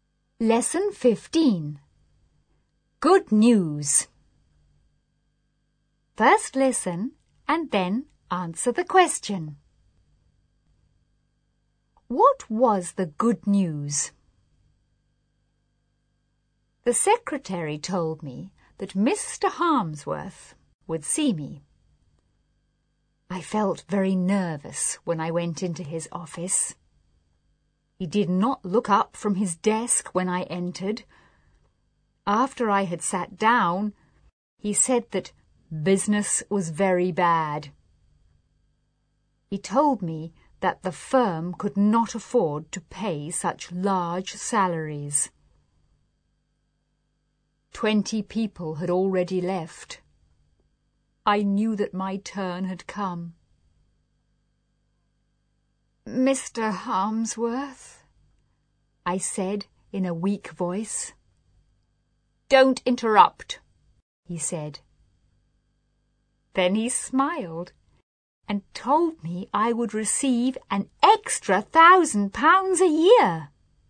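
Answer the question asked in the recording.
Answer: He would get an extra £1,000 a year.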